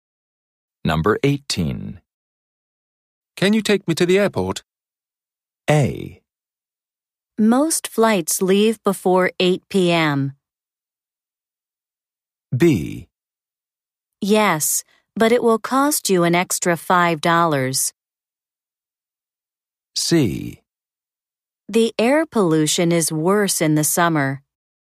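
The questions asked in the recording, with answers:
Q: Can you take me to the airport?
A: B: Yes, but it will cost you an extra $5.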